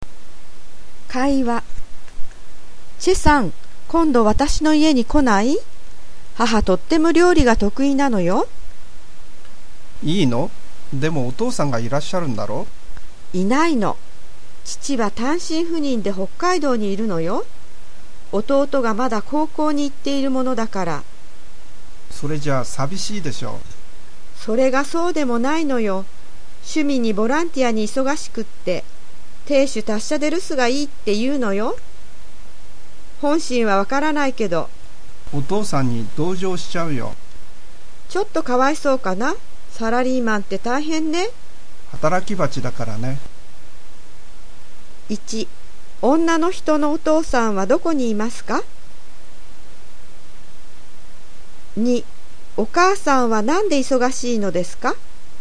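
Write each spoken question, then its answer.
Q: 女の人のお父さんはどこにいますか?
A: 北海道

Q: お母さんはなんで忙しいのですか?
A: 趣味とボランティア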